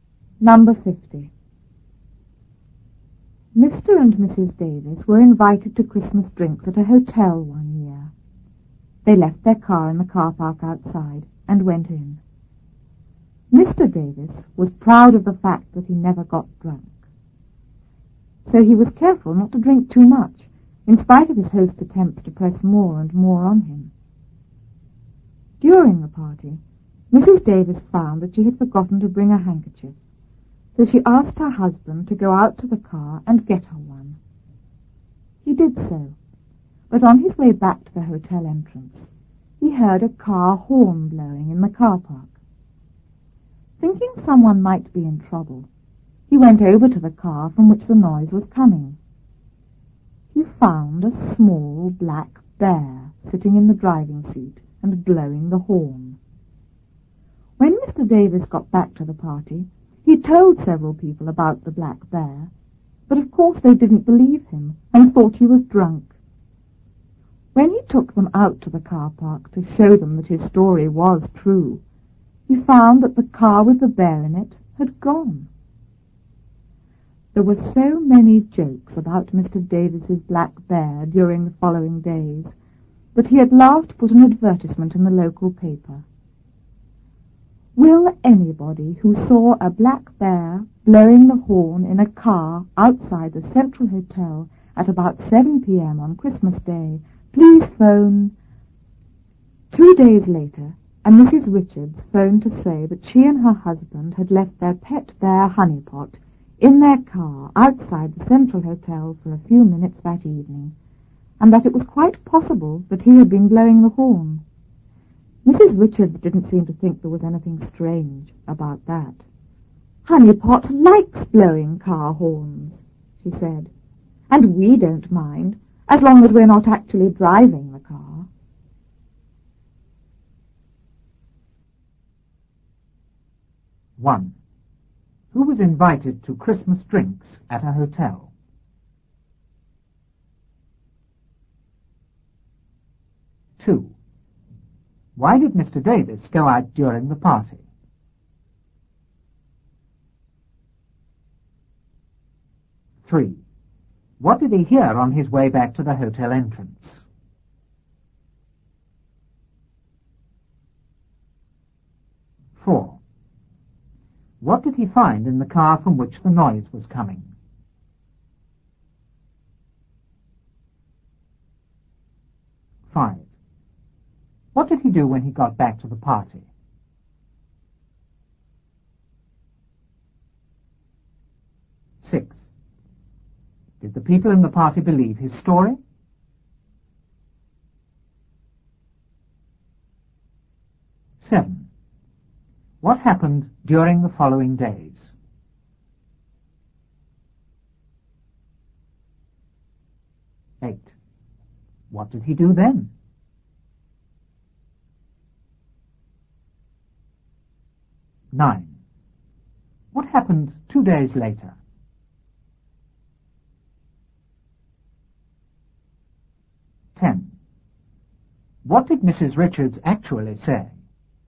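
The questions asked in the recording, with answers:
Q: Who was invited to Christmas drinks at a hotel?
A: Mr. and Mrs. Davis

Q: Why did Mr. Davis go out during the party?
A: To get a handkerchief from the car for his wife

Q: What did he hear on his way back to the hotel entrance?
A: A car horn blowing in the car park

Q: What did he find in the car from which the noise was coming?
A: A small black bear sitting in the driving seat blowing the horn

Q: What did he do when he got back to the party?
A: He told several people about the black bear

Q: Did the people in the party believe his story?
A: No, they thought he was drunk

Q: What happened during the following days?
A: There were many jokes about Mr. Davis's black bear

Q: What did he do then?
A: He put an advertisement in the local paper

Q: What happened 2 days later?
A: Mrs. Richards phoned to say their pet bear Honeypot had been left in their car outside the hotel

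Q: What did Mrs. Richards actually say?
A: Honeypot likes blowing car horns, and we don't mind, as long as we're not actually driving the car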